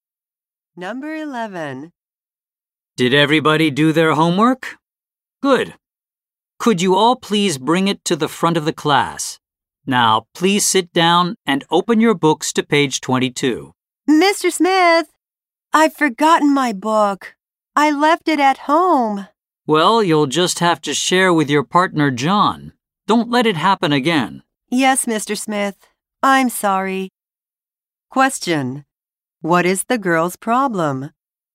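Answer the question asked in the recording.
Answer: She left her book at home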